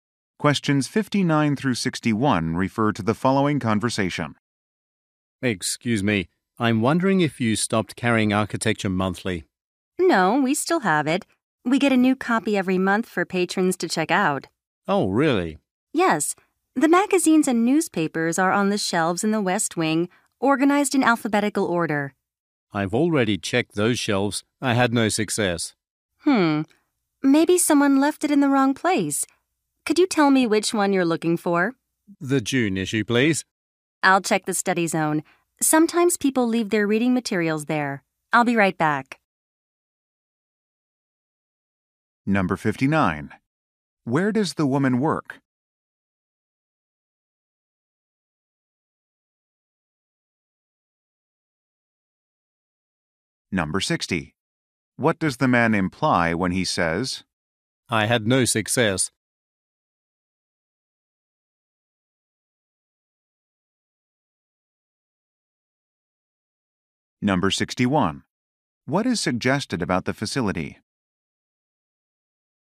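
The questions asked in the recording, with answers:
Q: Where does the woman work?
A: At a library

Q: What does the man imply when he says,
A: He could not find the magazine on the shelves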